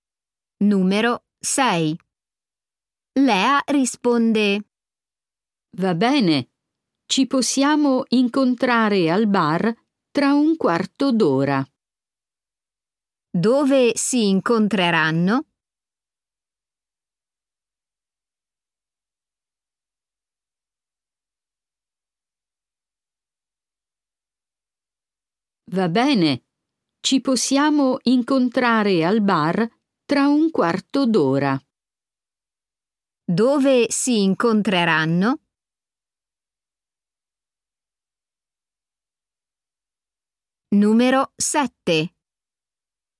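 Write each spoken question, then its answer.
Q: Dove si incontreranno?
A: al bar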